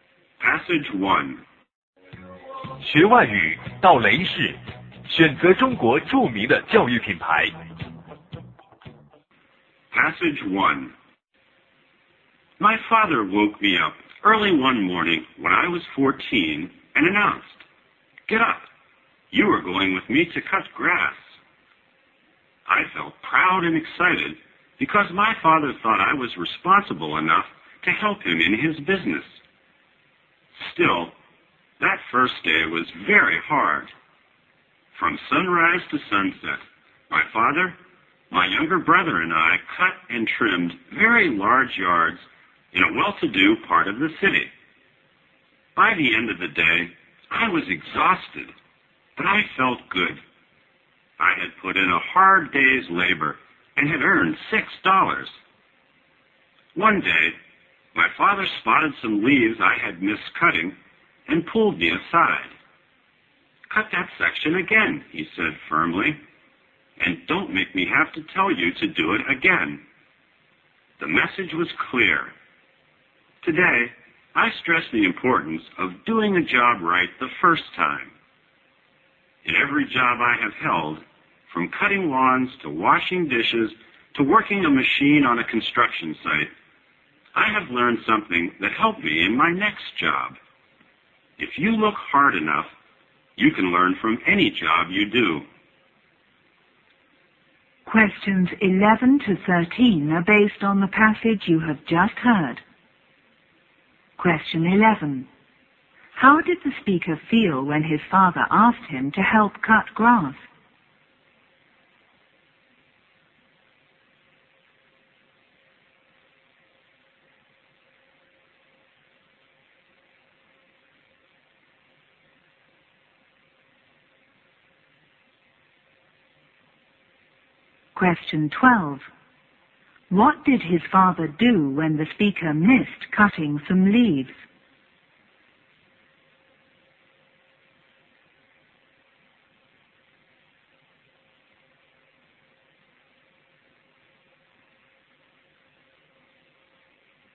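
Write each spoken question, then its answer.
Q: How did the speaker feel when his father asked him to help cut grass?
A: Proud and excited

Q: What did his father do when the speaker missed cutting some leaves?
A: He told him firmly to cut that section again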